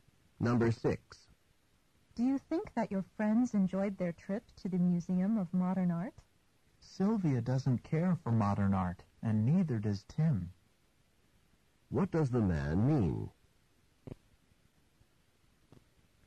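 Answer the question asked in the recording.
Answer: Neither Sylvia nor Tim likes modern art, so they didn't enjoy it.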